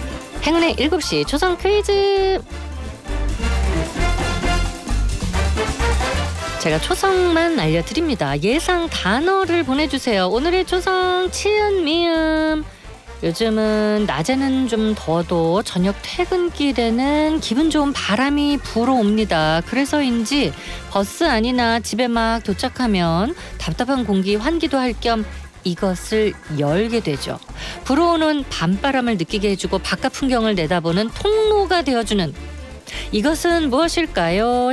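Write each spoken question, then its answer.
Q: 불어오는 밤바람을 느끼게 해주고 바깥 풍경을 내다보는 통로가 되어주는 이것은 무엇일까요?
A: 창문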